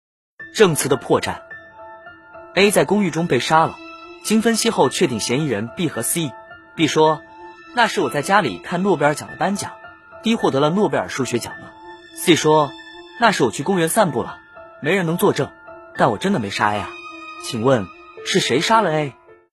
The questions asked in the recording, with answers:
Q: 请问是谁杀了 A?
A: 凶手是 B